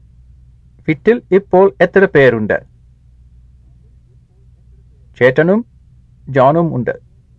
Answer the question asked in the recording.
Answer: രണ്ട് പേരുണ്ട്.